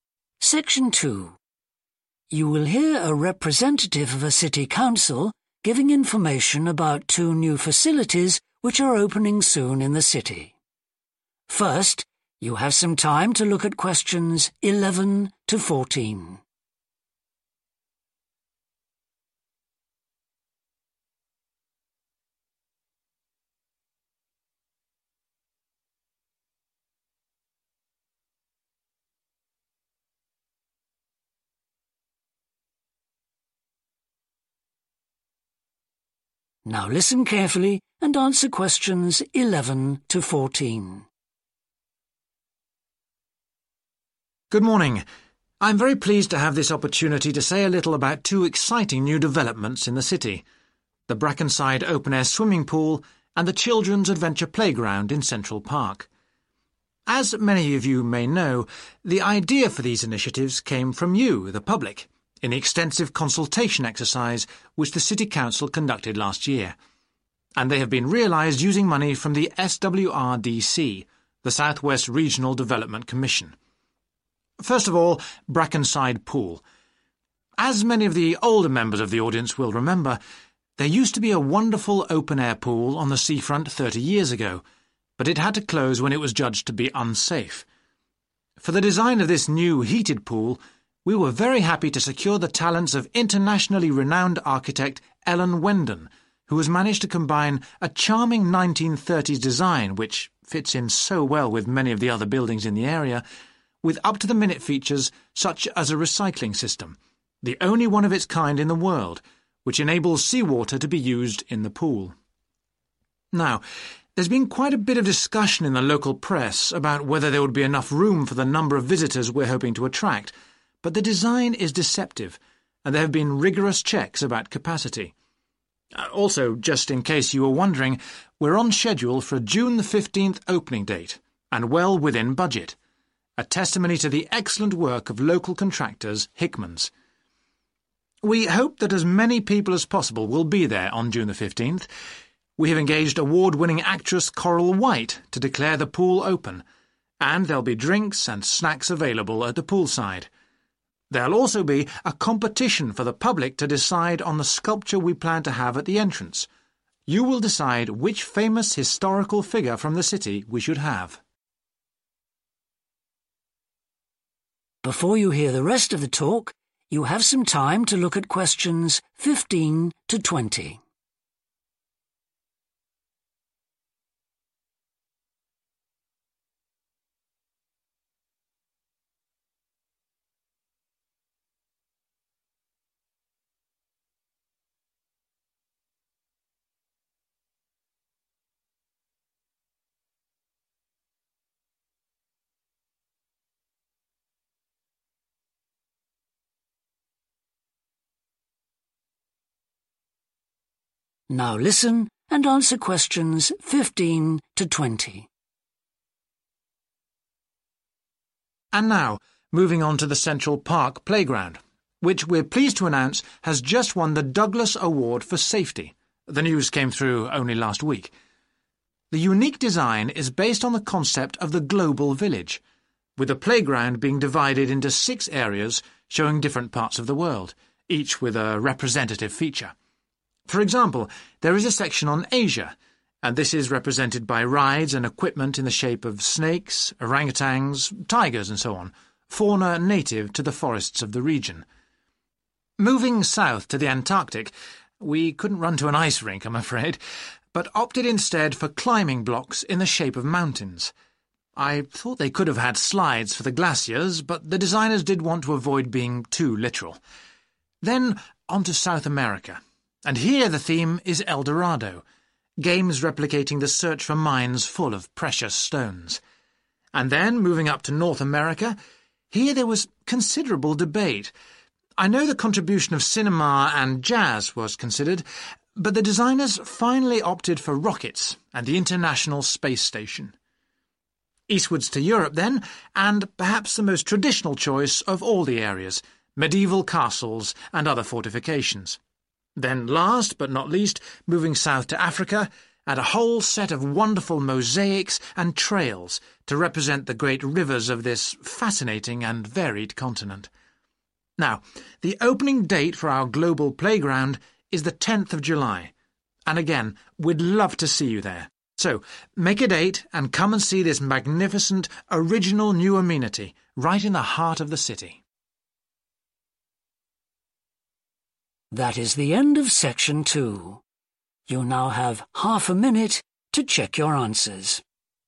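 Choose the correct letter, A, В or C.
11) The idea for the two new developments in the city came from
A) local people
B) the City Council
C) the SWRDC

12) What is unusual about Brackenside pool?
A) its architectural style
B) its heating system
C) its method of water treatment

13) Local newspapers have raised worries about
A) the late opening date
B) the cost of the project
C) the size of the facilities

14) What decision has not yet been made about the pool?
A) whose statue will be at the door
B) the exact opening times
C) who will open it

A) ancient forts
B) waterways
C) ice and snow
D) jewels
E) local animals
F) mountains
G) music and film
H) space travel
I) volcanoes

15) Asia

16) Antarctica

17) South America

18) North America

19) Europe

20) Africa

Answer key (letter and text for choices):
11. A) local people
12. C) its method of water treatment
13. C) the size of the facilities
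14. A) whose statue will be at the door
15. E) local animals
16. F) mountains
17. D) jewels
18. H) space travel
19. A) ancient forts
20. B) waterways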